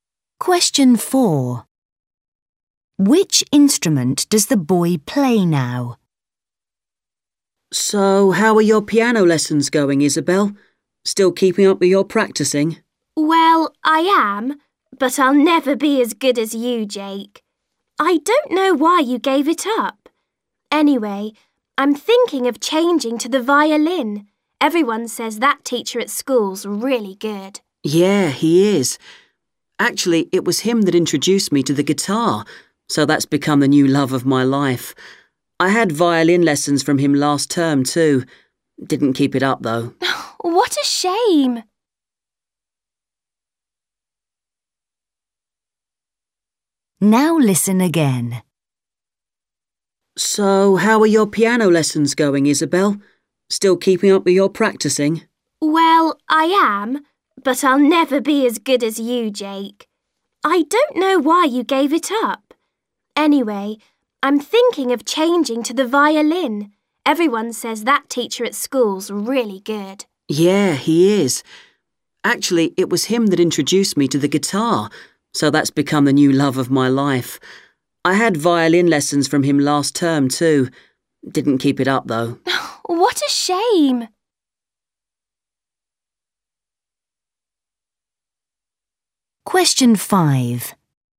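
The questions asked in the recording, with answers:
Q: Which instrument does the boy play now?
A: the guitar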